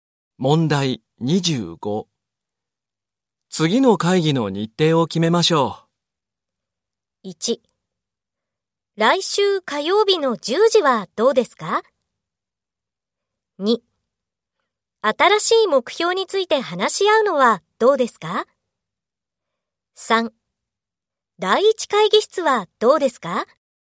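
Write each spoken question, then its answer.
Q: 次の会議の日程を決めましょう。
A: 2: 来週火曜日の10時はどうですか?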